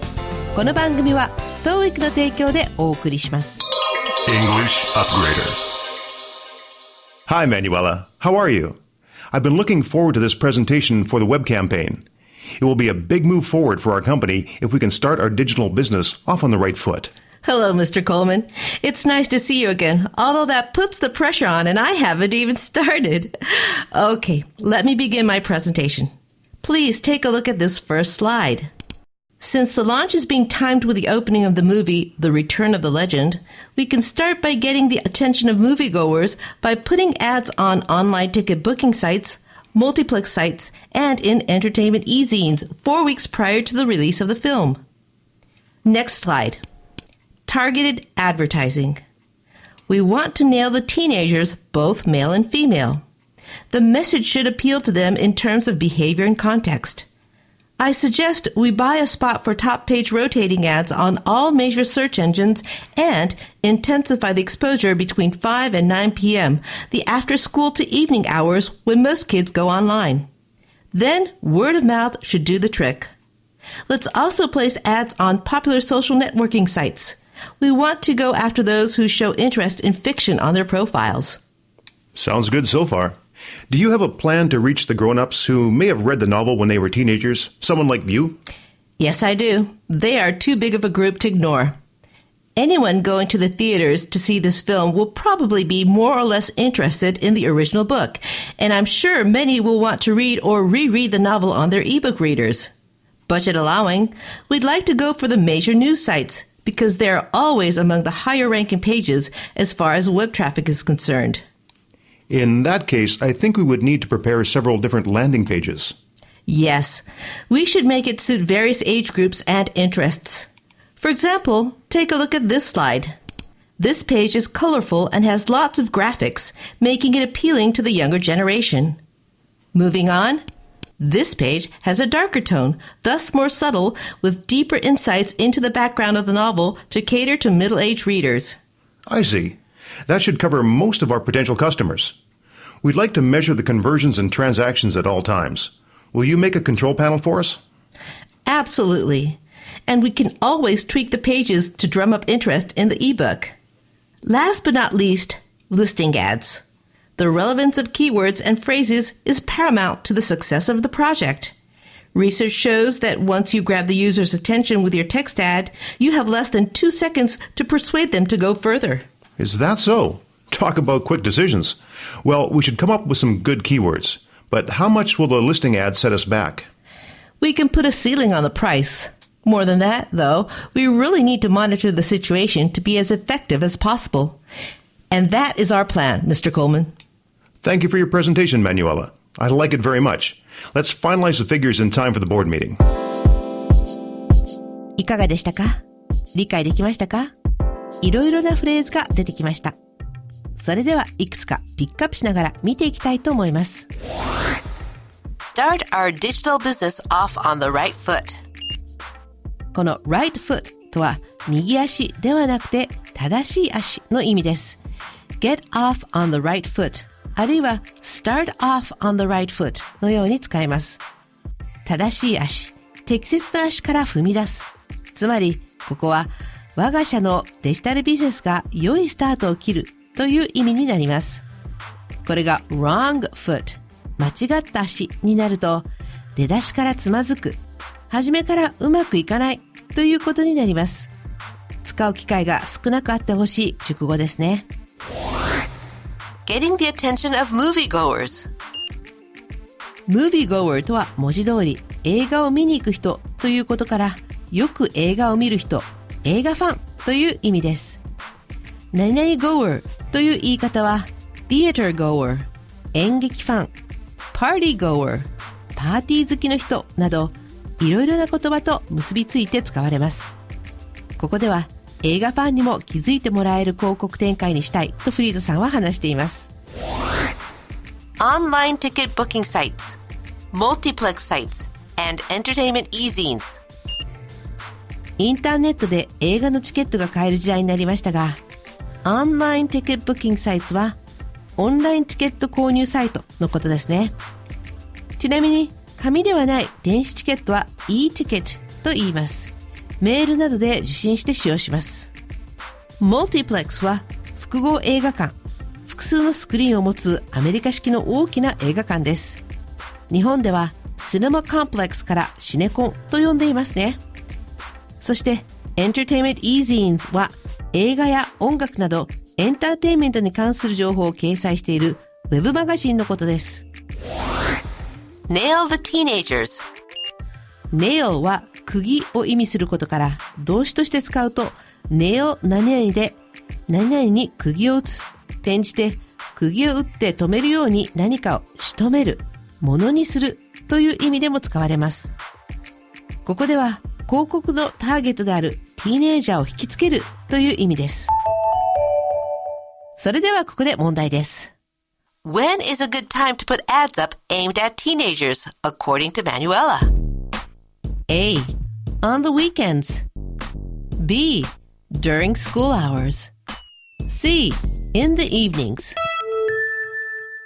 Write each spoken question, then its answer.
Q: When is a good time to put ads up aimed at teenagers according to Manuela?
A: 正解は C の夕方です